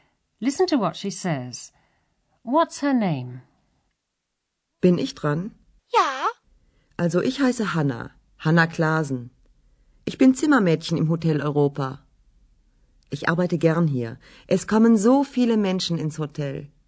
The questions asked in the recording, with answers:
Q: What's her name?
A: That was Hanna Klasen.